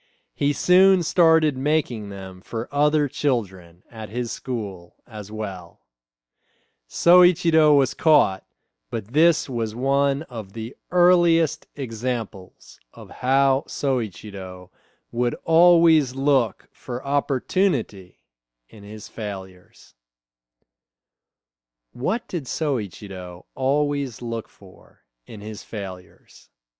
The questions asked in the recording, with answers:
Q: What did Soichiro always look for in his failures?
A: He always looked for opportunity in his failures.